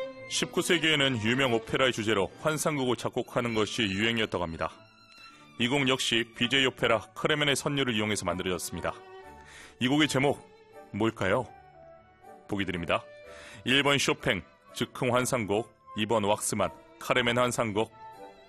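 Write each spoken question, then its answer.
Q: 이 곡의 제목 뭘까요?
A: 2번: 왁스만, 카르멘 환상곡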